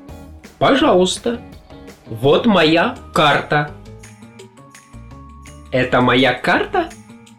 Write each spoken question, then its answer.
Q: Это моя карта?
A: Да, моя карта.